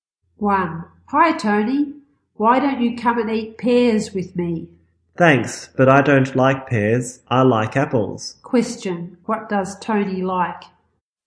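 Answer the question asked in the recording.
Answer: Apples.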